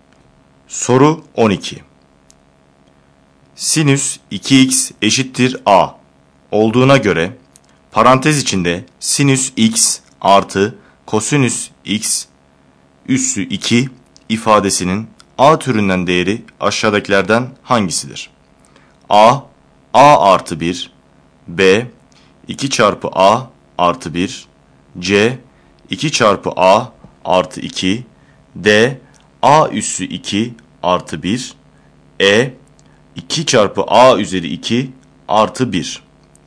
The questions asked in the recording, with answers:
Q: Sinüs 2x eşittir A olduğuna göre parantez içinde sinüs x artı kosinüs x üssü 2 ifadesinin A türünden değeri aşağıdakilerden hangisidir?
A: Doğru yanıt A şıkkı.